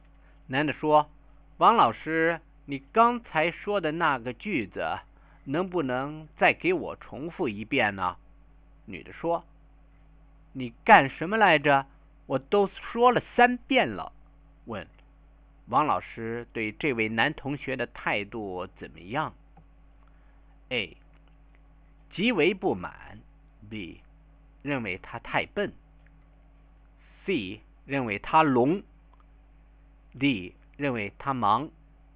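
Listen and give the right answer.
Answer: A: 极为不满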